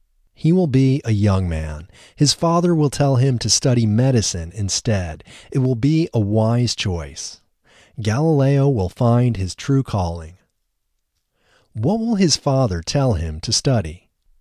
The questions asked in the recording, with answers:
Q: What will his father tell him to study?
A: His father will tell him to study medicine.